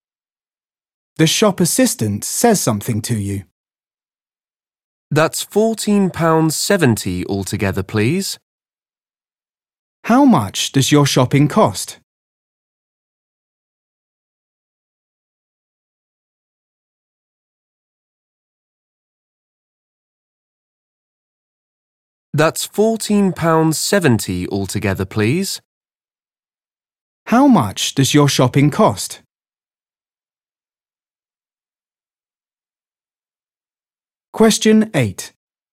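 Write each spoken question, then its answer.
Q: How much does your shopping cost?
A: £14.70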